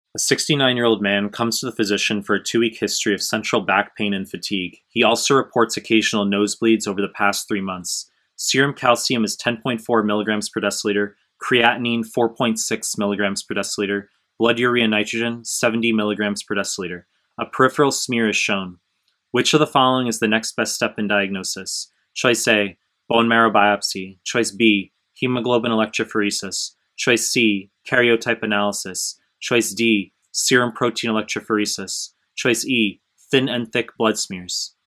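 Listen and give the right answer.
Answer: D: serum protein electrophoresis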